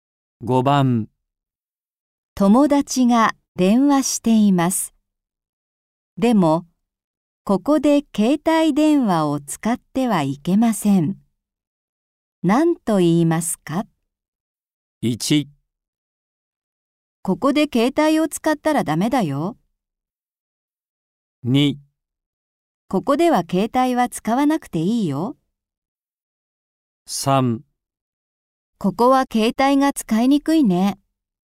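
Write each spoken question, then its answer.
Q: 何と言いますか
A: 1: ここで携帯を使ったらダメだよ。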